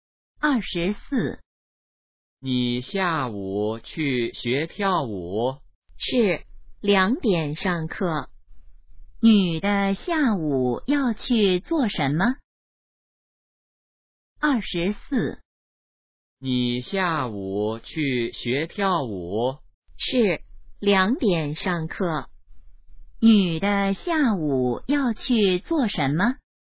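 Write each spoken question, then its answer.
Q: 女的下午要去做什么?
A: 学跳舞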